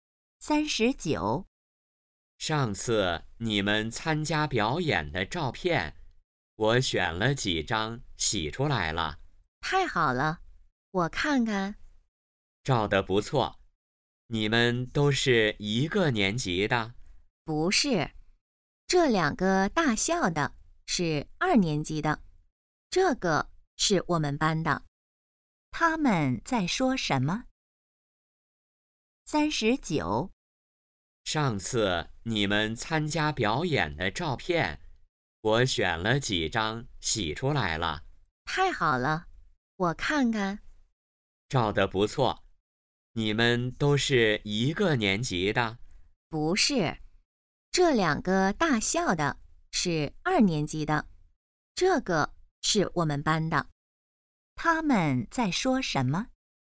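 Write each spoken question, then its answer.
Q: 他们在说什么?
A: 表演的照片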